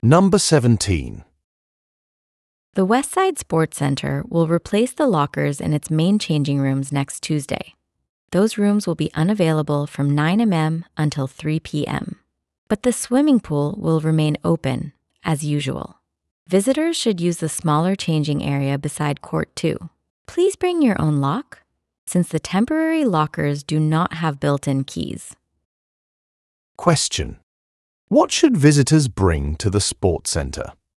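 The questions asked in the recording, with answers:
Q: What should visitors bring to the sports center?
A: Their own lock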